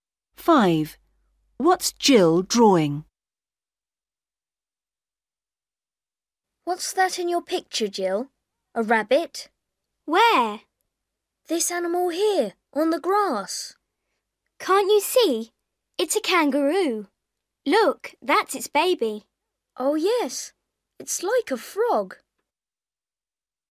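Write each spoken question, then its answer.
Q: What's Jill drawing?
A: a kangaroo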